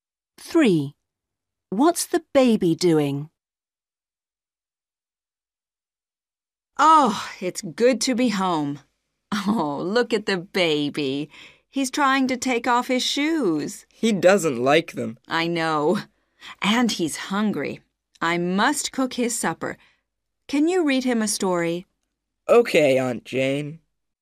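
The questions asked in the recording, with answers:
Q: What's the baby doing?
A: trying to take off his shoes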